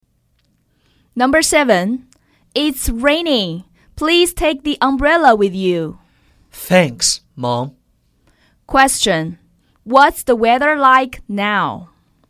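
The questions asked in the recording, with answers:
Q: What's the weather like now?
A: It's raining.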